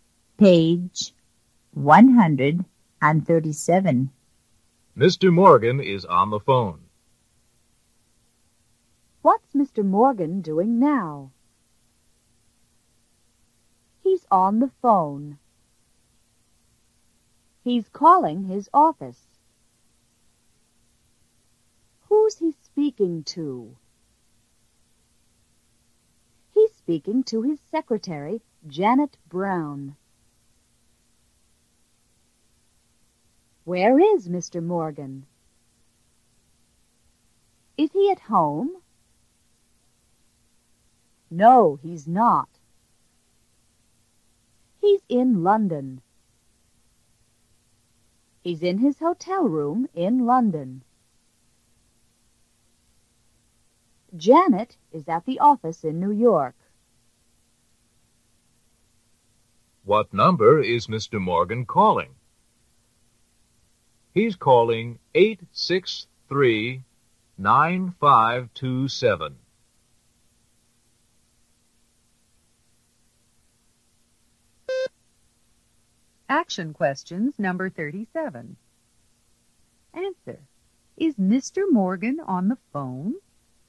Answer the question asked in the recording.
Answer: Yes, he is.